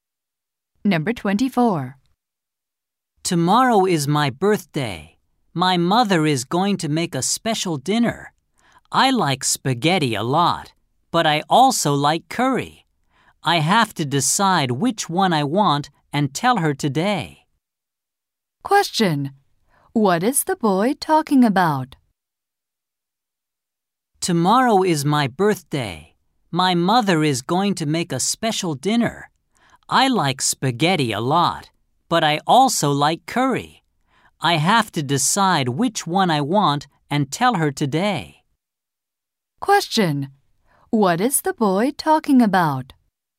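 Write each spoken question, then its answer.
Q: Question. What is the boy talking about?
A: What he wants for his birthday dinner.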